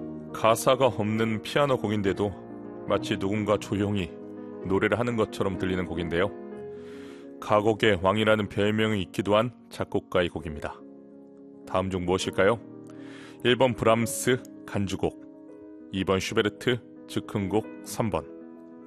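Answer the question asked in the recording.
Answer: 2: 슈베르트 즉흥곡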